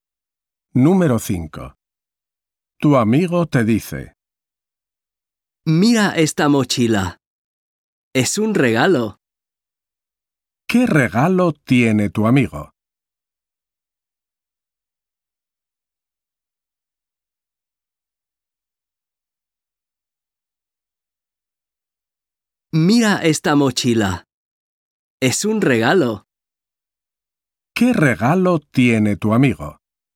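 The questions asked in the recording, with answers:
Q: ¿Qué regalo tiene tu amigo?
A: Una mochila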